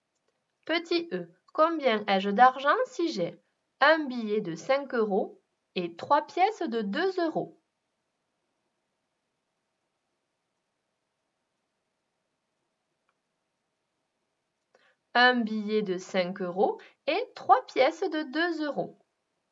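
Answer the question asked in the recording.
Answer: 11 euros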